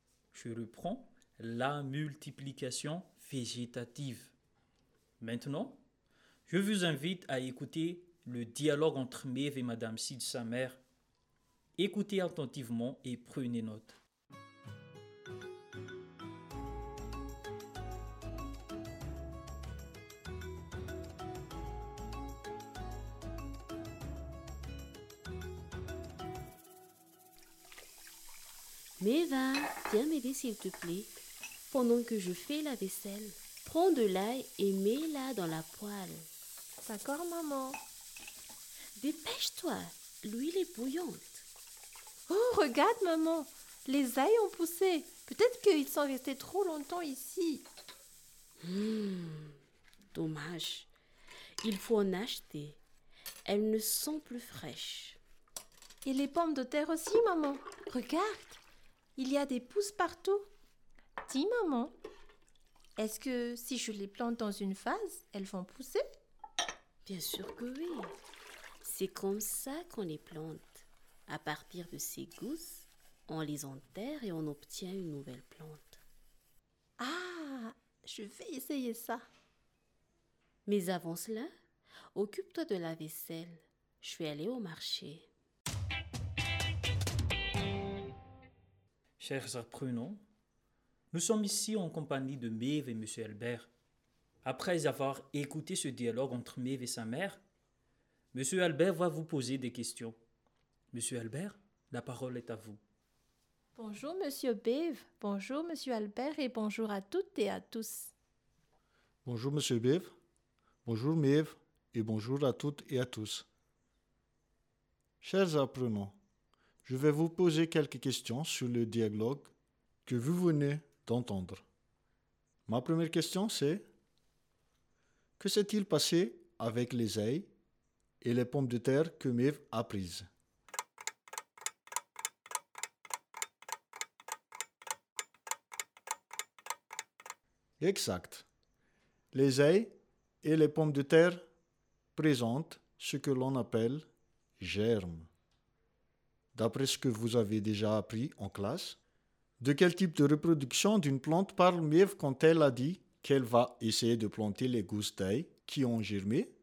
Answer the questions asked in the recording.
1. Les ailes et les pommes de terre présentent ce que l'on appelle germes.
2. C'est la multiplication végétative.